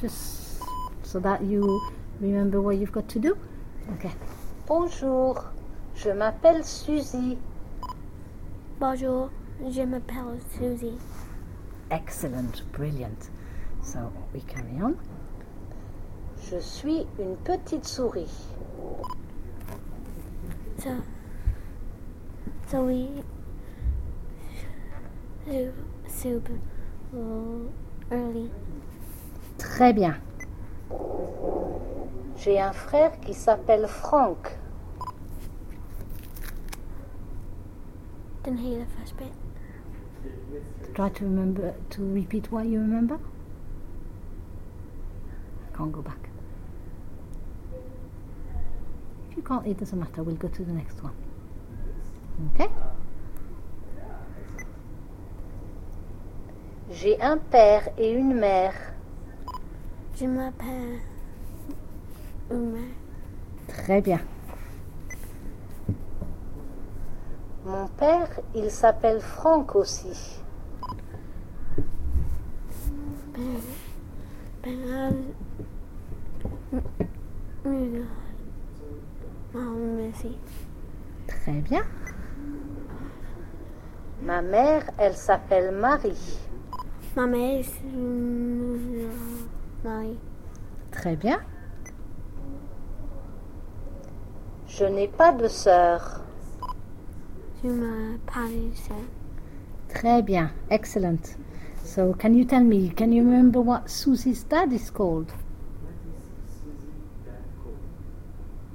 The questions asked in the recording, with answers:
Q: can you remember what Susie's dad is called?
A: He was called Franck.